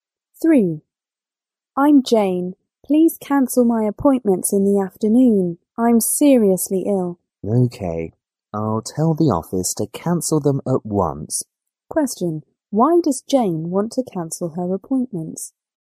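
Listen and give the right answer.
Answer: Because she is seriously ill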